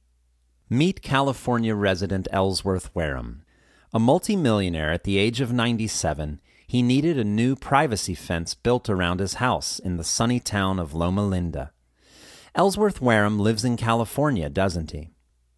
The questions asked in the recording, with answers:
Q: Ellsworth Wareham lives in California, doesn't he?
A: Yes, he does. He's a California resident.